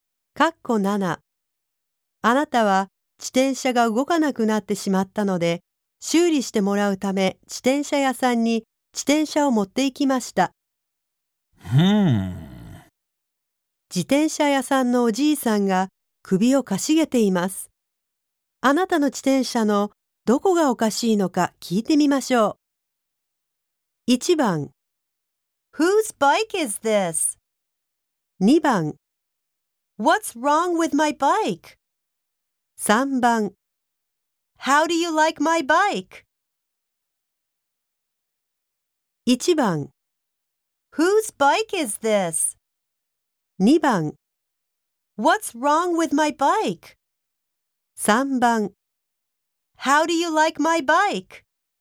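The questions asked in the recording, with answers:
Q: あなたの自転車のどこがおかしいのか聞いてみましょう。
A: 2: What's wrong with my bike?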